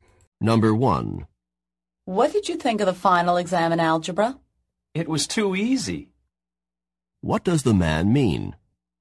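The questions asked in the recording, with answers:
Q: What does the man mean?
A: The algebra final was very easy.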